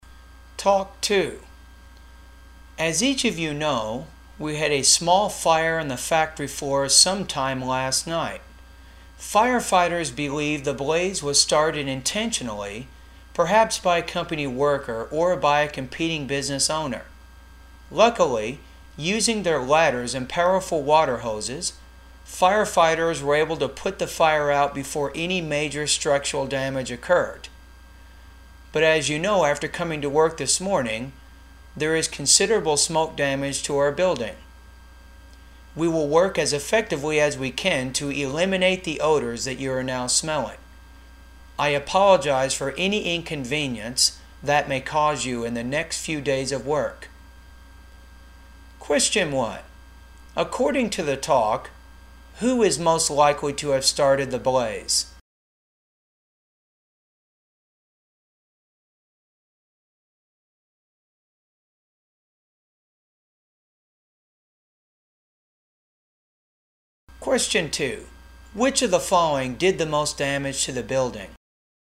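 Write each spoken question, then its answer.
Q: According to the talk, who is most likely to have started the blaze?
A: A company worker or a competing business owner

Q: Which of the following did the most damage to the building?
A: Smoke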